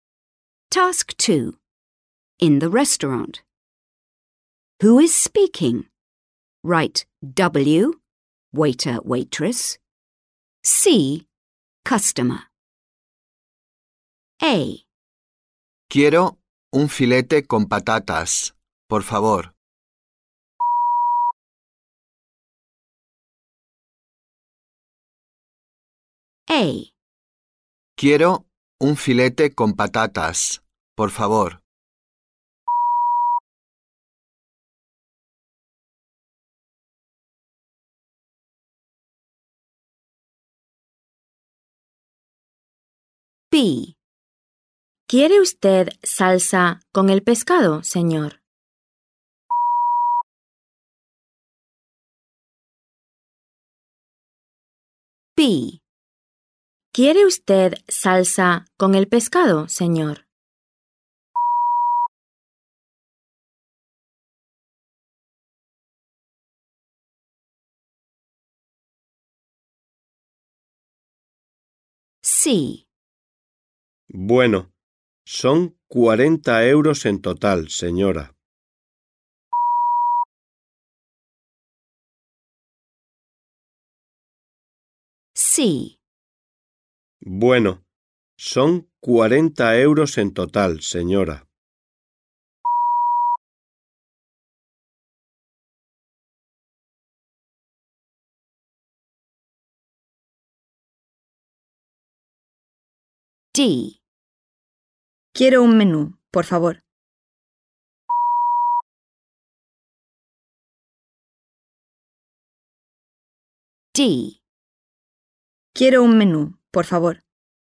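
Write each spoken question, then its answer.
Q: Who is speaking?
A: C: customer

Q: Who is speaking?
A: W: waiter

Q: Who is speaking?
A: W: waiter/waitress

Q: Who is speaking?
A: C: customer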